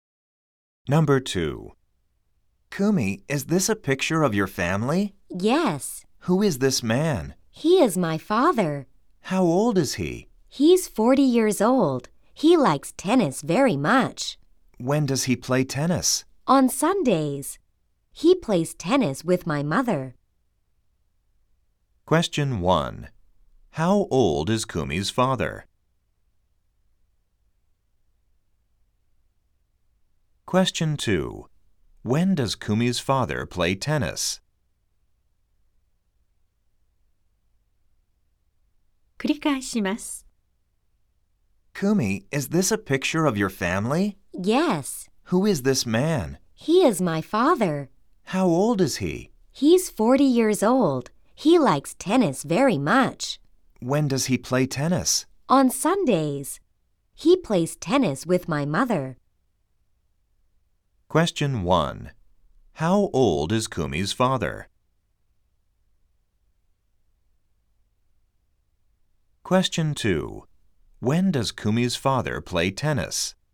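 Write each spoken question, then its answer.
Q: How old is Kumi's father?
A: 40歳

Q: When does Kumi's father play tennis?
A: 日曜日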